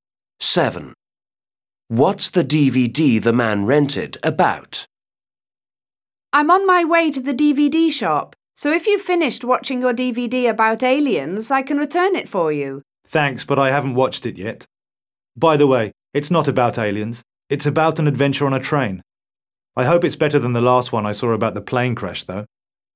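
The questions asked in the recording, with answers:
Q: What's the DVD the man rented about?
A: An adventure on a train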